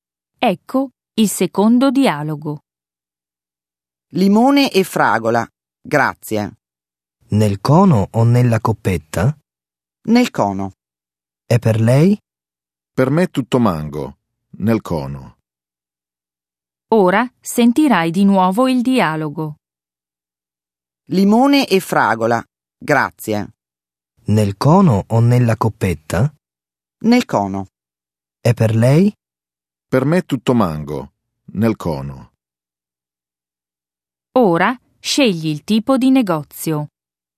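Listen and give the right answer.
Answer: gelateria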